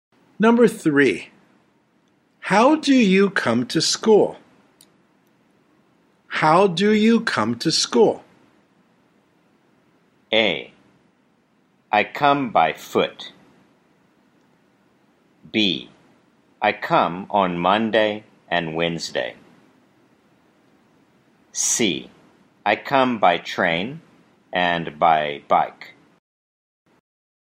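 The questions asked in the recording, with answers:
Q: how do you come to school?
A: C: I come by train and by bike.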